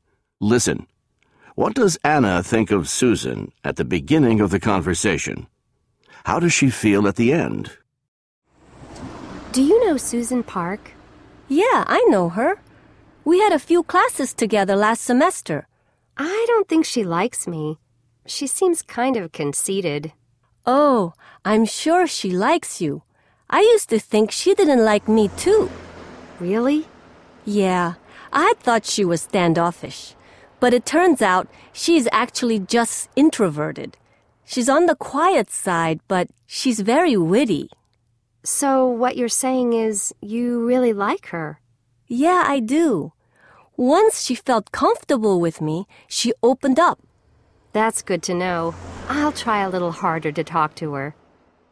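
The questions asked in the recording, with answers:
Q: What does Anna think of Susan at the beginning of the conversation?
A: She thinks Susan doesn't like her and seems kind of conceited.

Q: How does she feel at the end?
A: She feels better about Susan and will try harder to talk to her.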